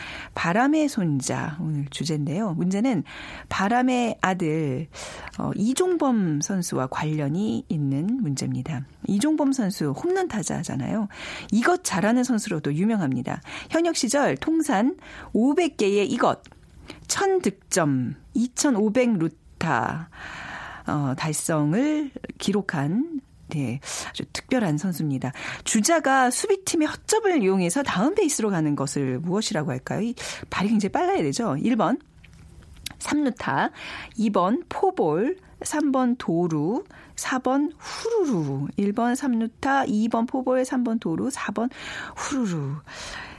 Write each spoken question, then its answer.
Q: 주자가 수비팀의 허점을 이용해서 다음 베이스로 가는 것을 무엇이라고 할까요?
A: 오늘 비키즈 정답은 3번 도루입니다.